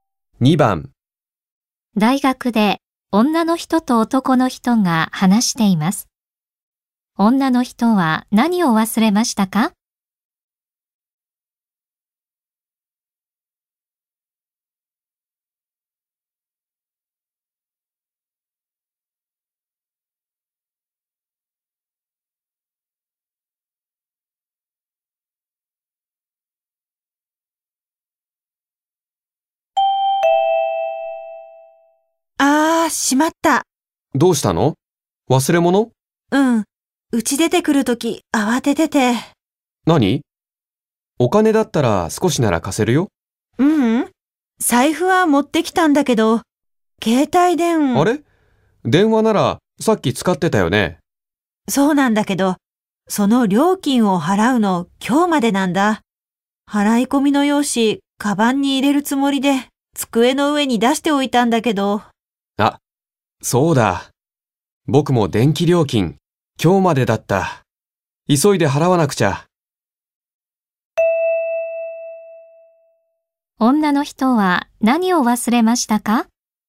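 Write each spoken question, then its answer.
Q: 女の人は何を忘れましたか?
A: 携帯電話の料金の払い込み用紙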